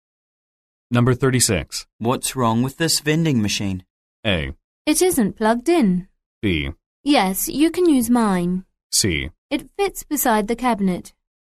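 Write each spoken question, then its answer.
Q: What's wrong with this vending machine?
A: A: It isn't plugged in.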